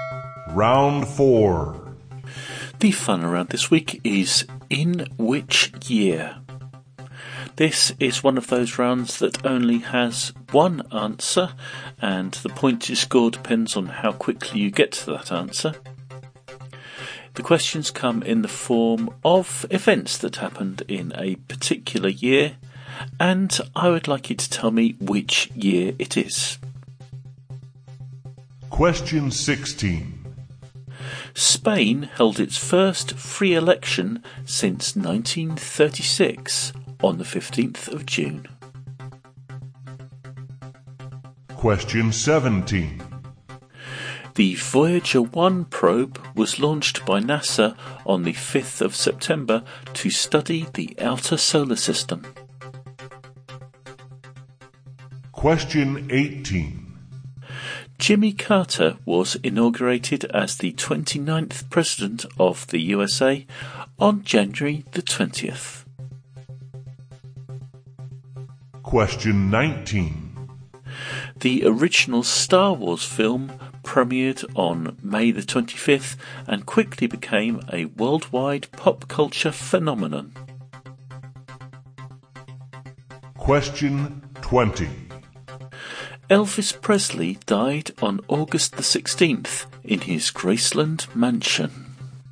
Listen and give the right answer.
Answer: And the year we were looking for on this occasion was 1977.